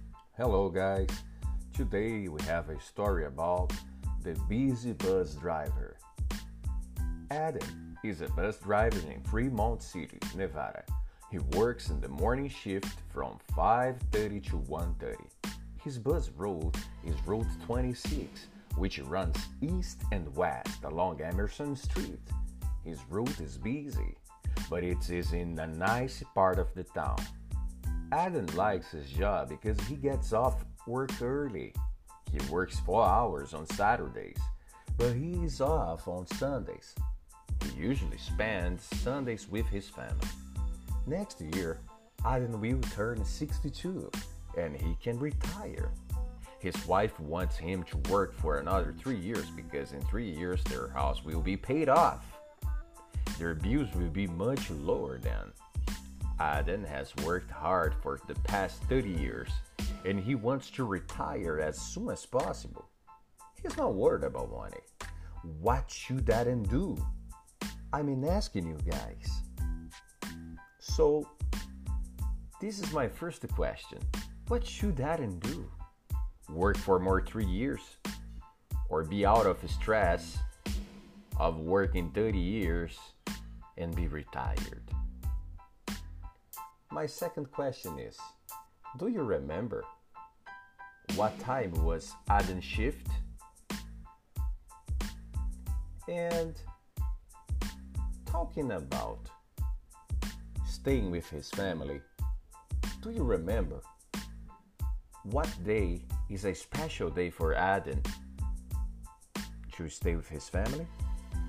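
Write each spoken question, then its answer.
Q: do you remember what time was Adam's shift?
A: 5:30 to 1:30 (morning shift)

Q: do you remember what day is a special day for Adam to stay with his family?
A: Sunday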